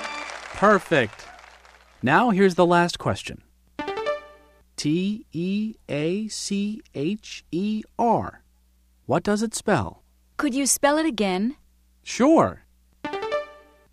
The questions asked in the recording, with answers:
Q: T-E-A-C-H-E-R. What does it spell?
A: T-E-A-C-H-E-R spells teacher.